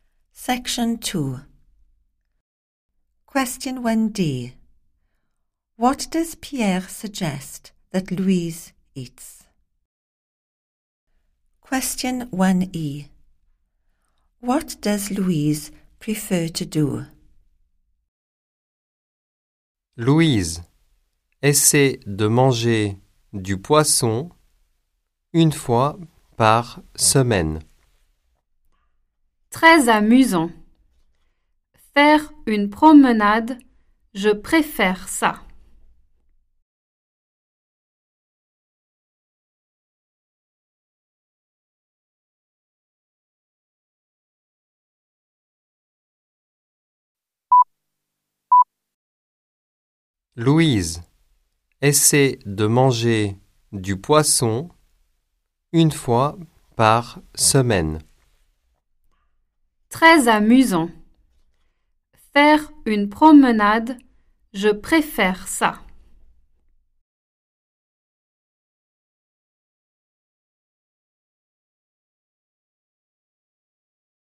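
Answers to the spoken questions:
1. fish once a week
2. go for a walk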